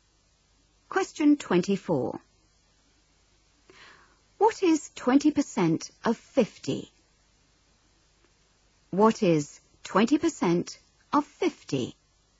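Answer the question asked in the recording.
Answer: 10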